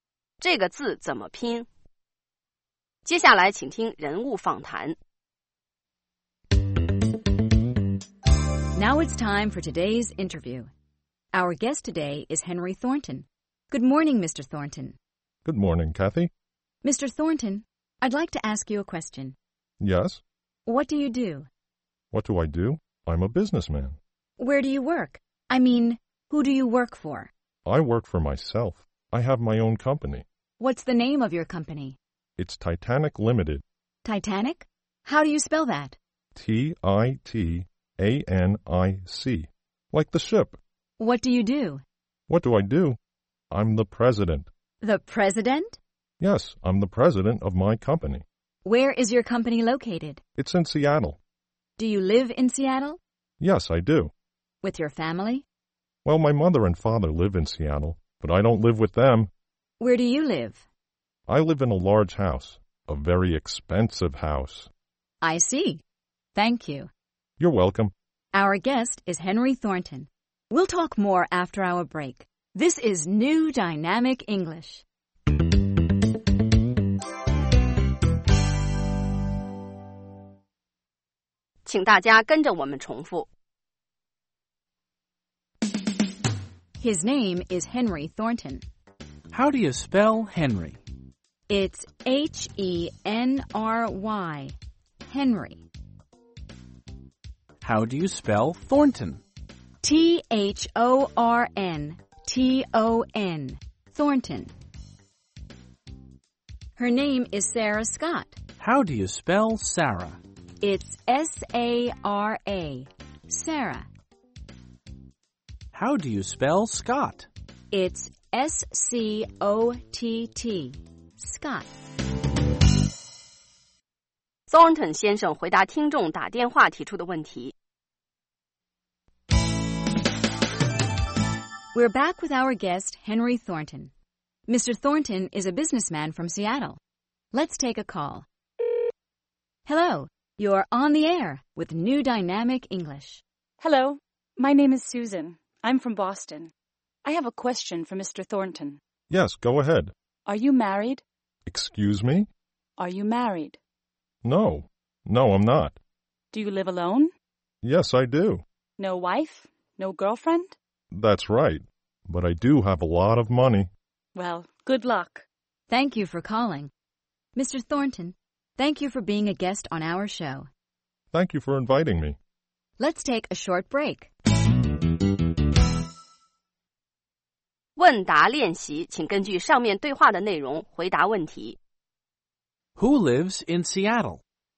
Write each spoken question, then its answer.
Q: Who lives in Seattle?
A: Henry Thornton lives in Seattle.